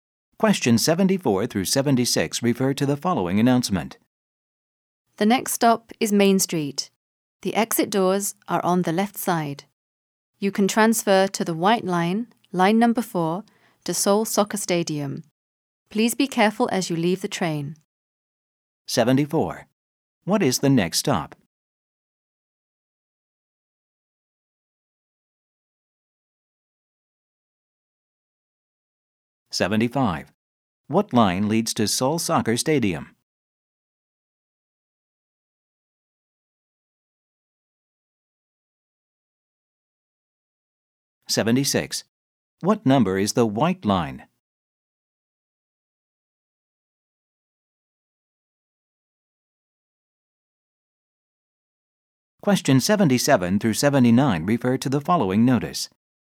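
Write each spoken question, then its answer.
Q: What is the next stop?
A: Main Street

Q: What line leads to Seoul Soccer Stadium?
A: The white line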